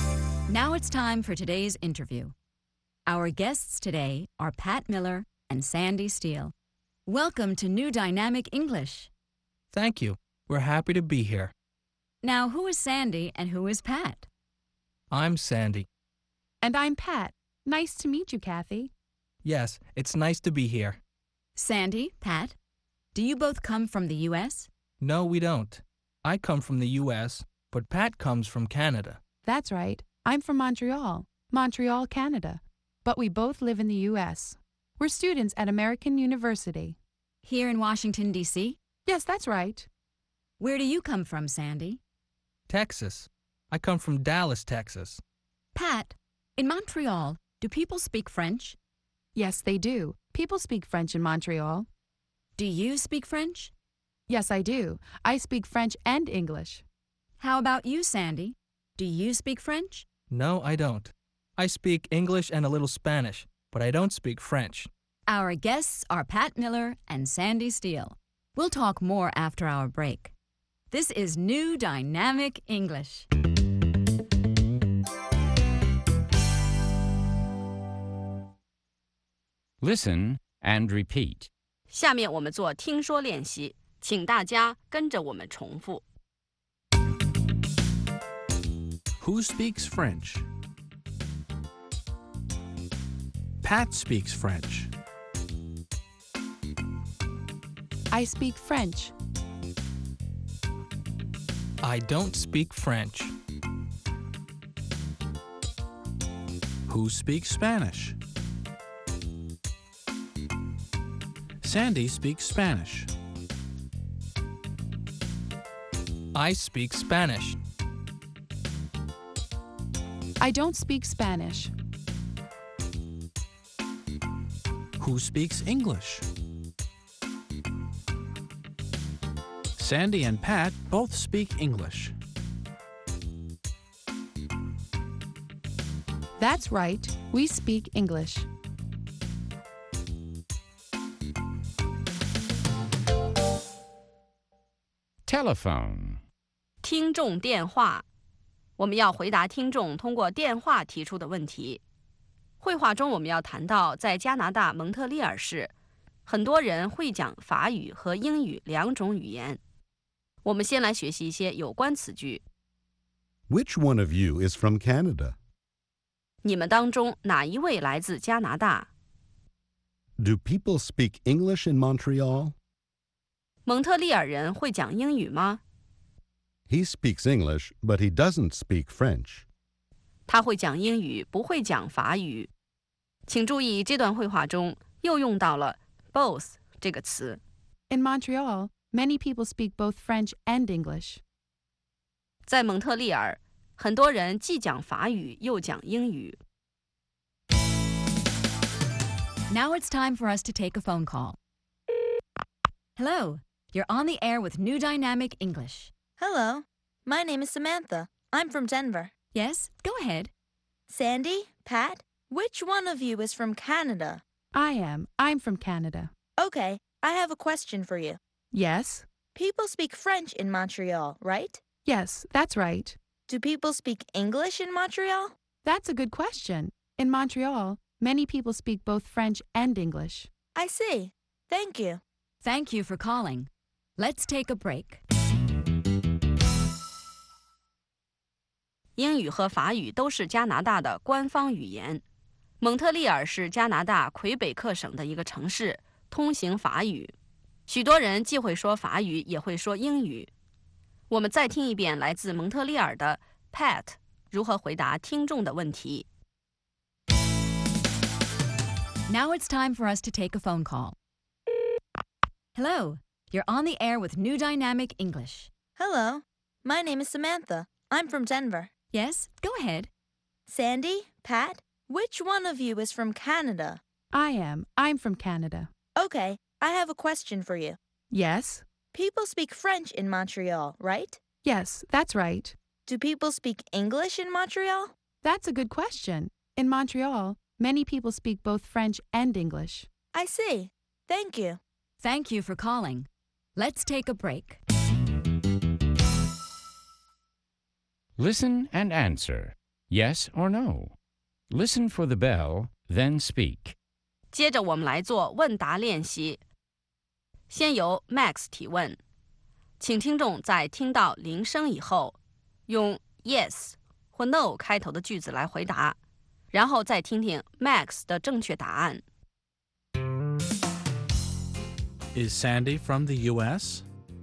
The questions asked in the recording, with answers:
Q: Is Sandy from the U.S.?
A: Yes, he is. He's from the U.S.